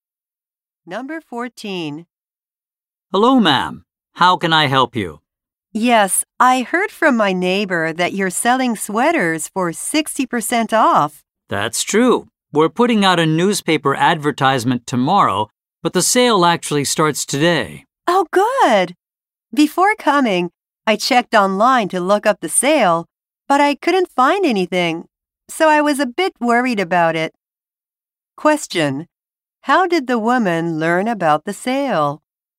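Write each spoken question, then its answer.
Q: How did the woman learn about the sale?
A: From her neighbor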